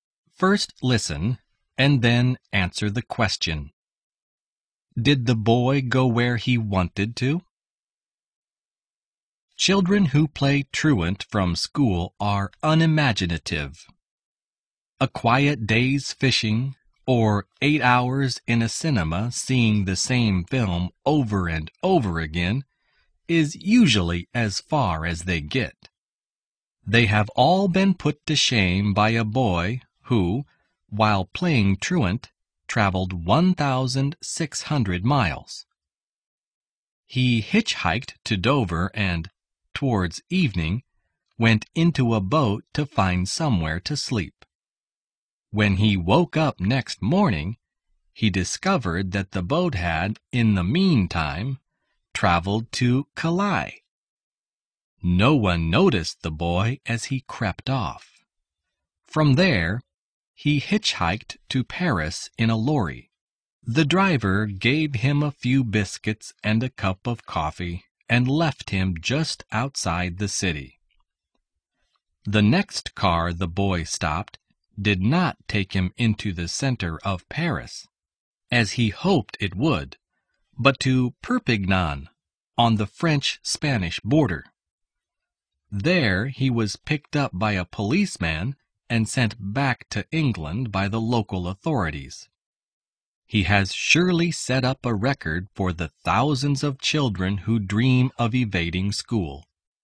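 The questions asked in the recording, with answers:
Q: Did the boy go where he wanted to?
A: No, he wanted to go to Paris but ended up in Perpignan.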